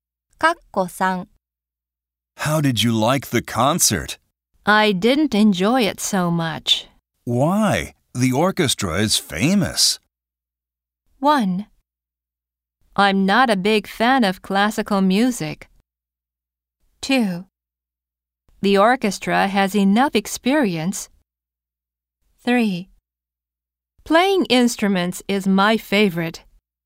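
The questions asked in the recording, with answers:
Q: Why? The orchestra is famous.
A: 1: I'm not a big fan of classical music.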